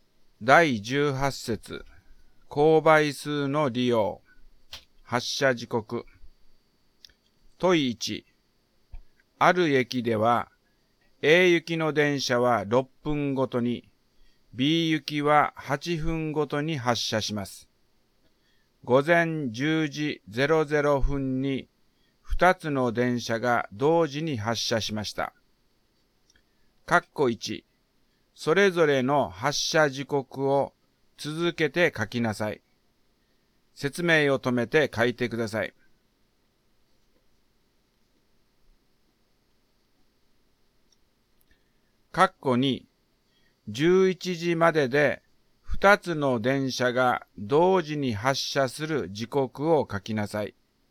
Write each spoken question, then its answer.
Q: 括弧2、11時までで2つの電車が同時に発車する時刻を書きなさい。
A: 問1、括弧2の答えは、10時24分と10時48分になりますね。